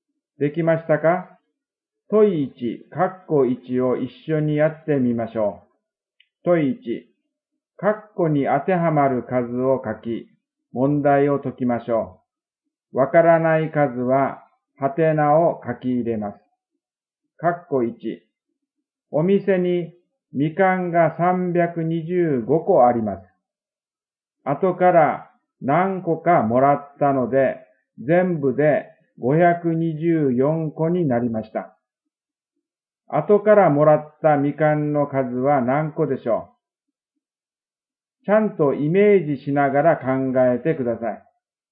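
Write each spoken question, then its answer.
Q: 後からもらったみかんの数は何個でしょう?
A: 199個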